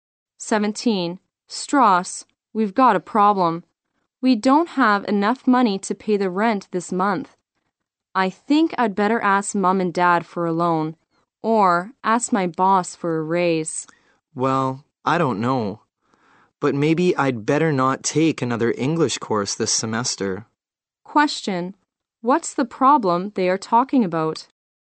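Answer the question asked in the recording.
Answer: They don't have enough money to pay the rent this month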